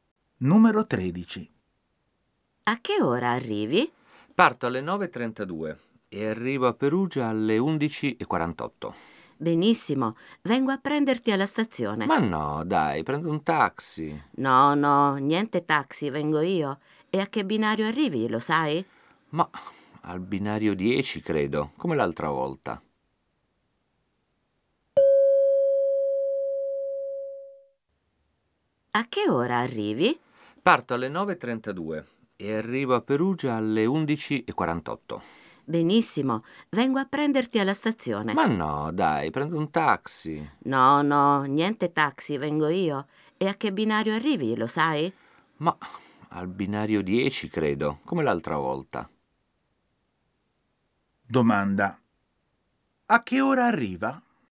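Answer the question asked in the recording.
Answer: Alle 11:48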